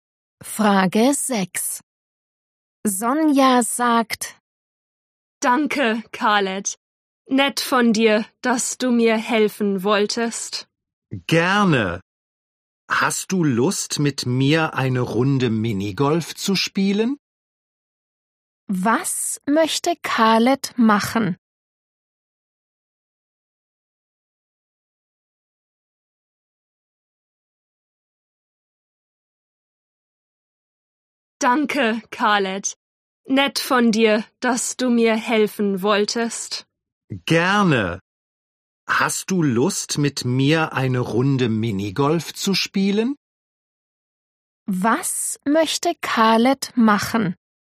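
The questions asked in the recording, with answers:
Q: Was möchte Khaled machen?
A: Minigolf spielen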